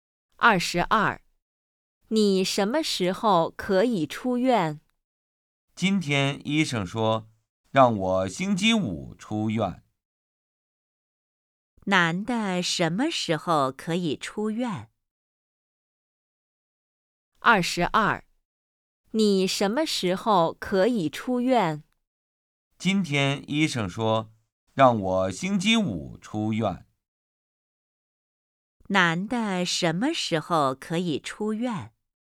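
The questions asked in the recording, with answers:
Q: 男的什么时候可以出院?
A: 星期五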